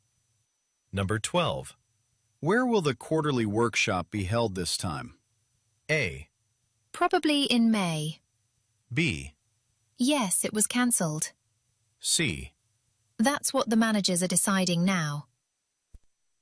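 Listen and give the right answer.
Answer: C: That's what the managers are deciding now.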